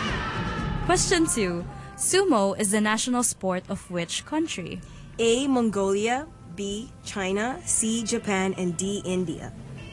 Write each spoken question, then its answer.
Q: Sumo is the national sport of which country?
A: Yes, Japan.